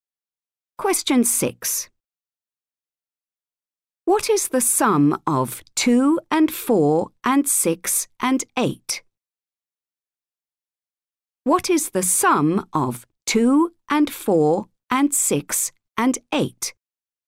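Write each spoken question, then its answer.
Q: What is the sum of 2 and 4 and 6 and 8?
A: 20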